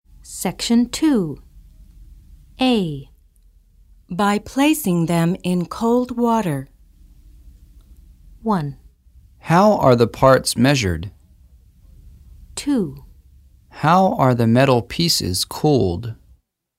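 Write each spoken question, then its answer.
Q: By placing them in cold water.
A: 2: How are the metal pieces cooled?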